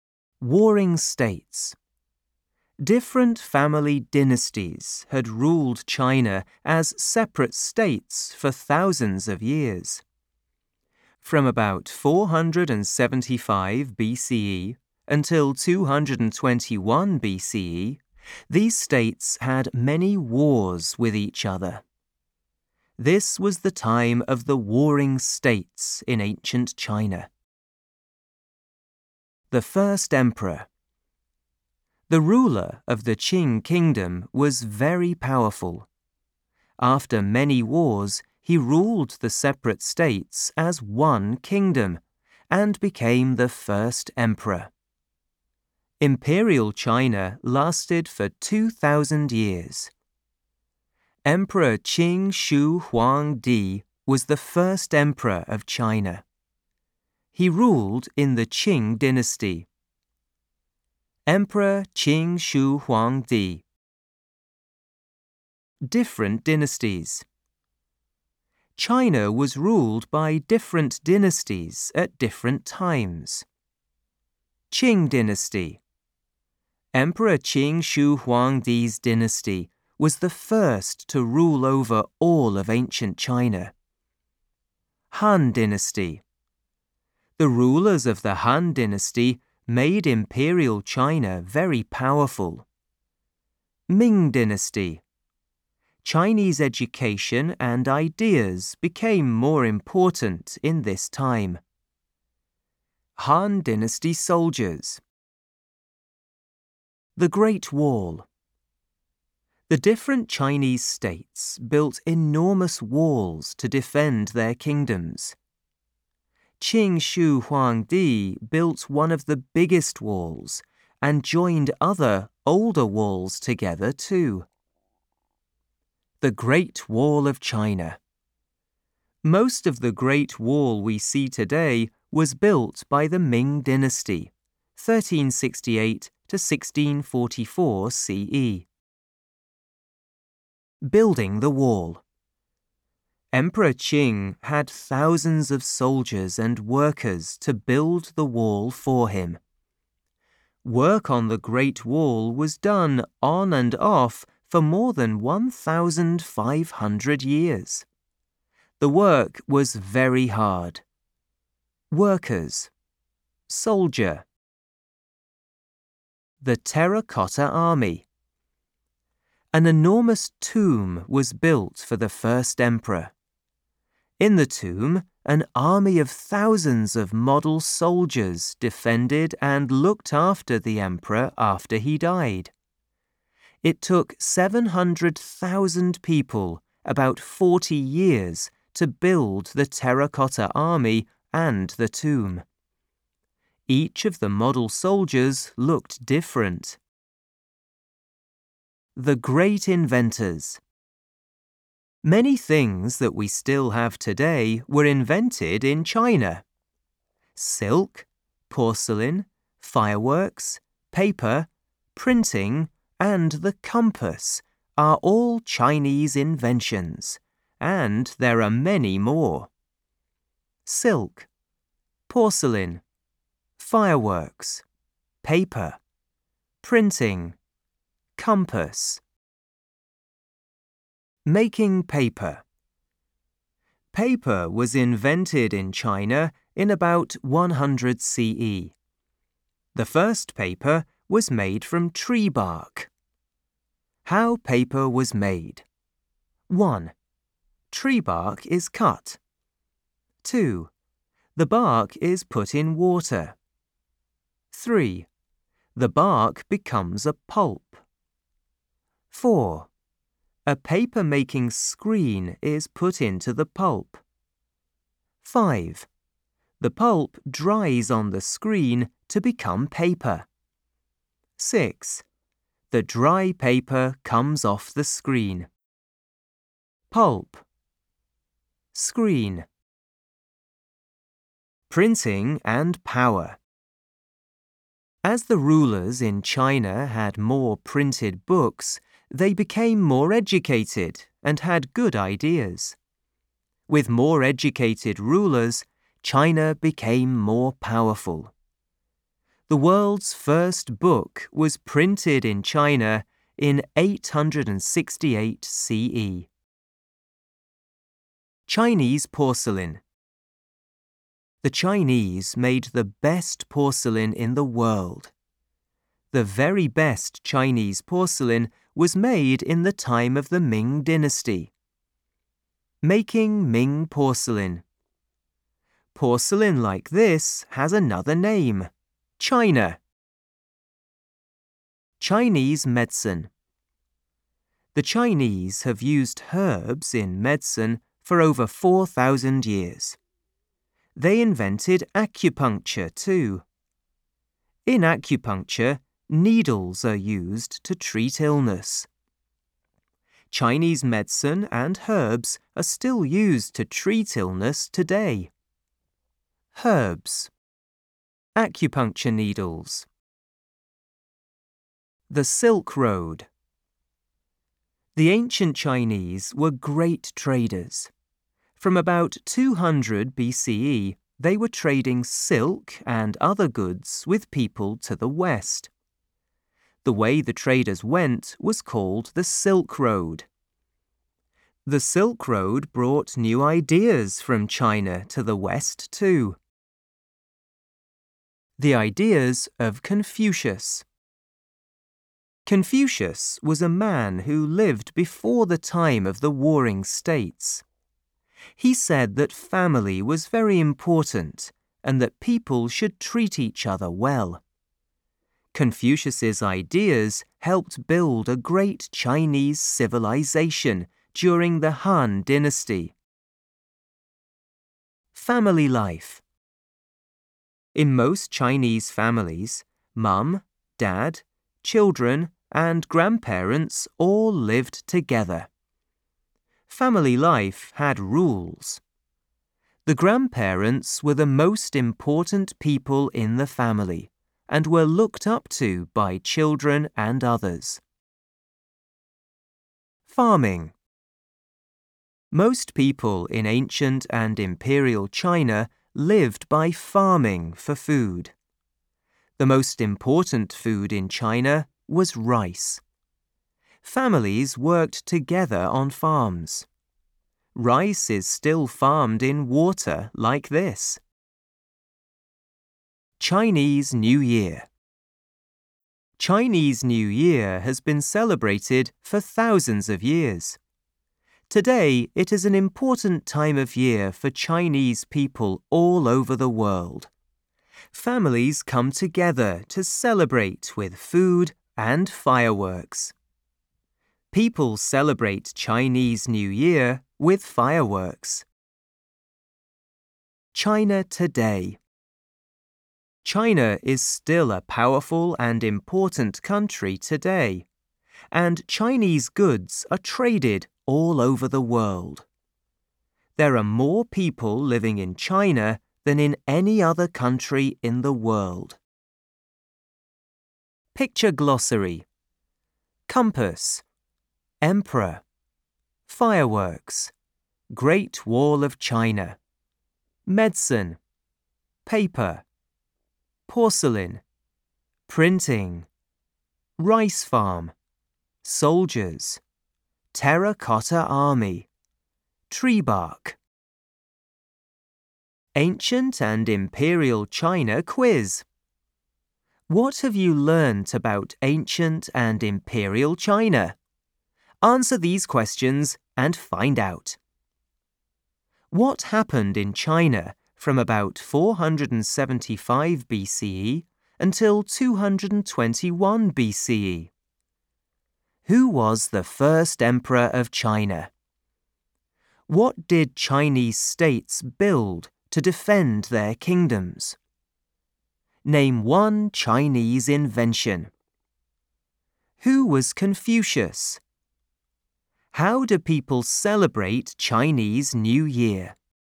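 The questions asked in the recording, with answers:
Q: What happened in China from about 475 BCE until 221 BCE?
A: The states had many wars with each other (the Warring States period)

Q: Who was the first emperor of China?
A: Emperor Qin Shi Huangdi

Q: What did Chinese states build to defend their kingdoms?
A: Enormous walls

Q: Name one Chinese invention.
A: Paper (also silk, porcelain, fireworks, printing, the compass)

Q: Who was Confucius?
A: A man who lived before the Warring States and said family was very important and people should treat each other well

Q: How do people celebrate Chinese New Year?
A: Families come together with food and fireworks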